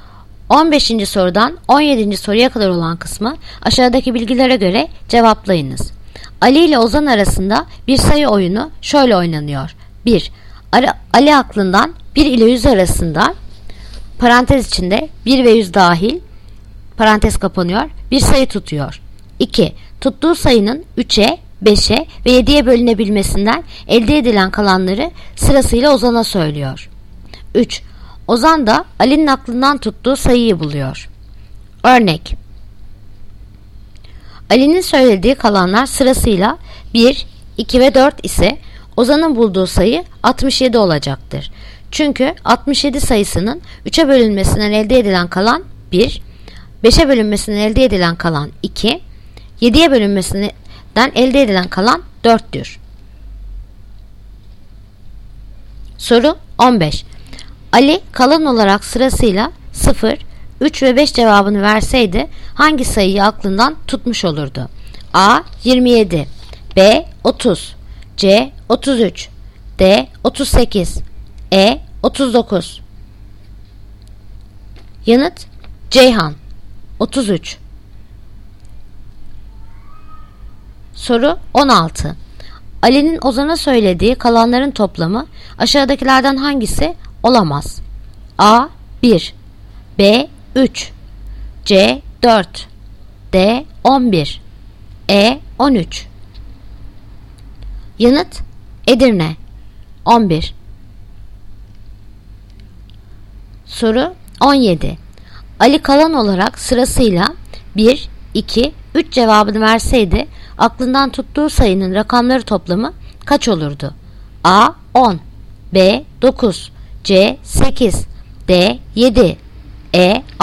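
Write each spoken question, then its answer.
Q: Ali kalan olarak sırasıyla 0, 3 ve 5 cevabını verseydi hangi sayıyı aklından tutmuş olurdu?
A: C: 33

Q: Ali kalan olarak sırasıyla 1, 2, 3 cevabını verseydi aklından tuttuğu sayının rakamları toplamı kaç olurdu?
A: Yanıt Diyarbakır. 7.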